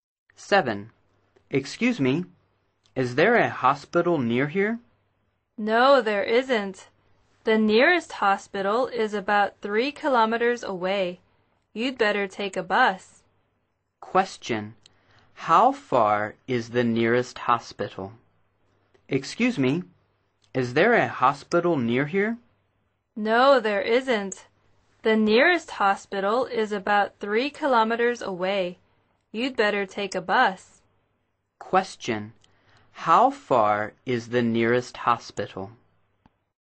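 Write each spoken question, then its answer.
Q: How far is the nearest hospital?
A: About 3 kilometers away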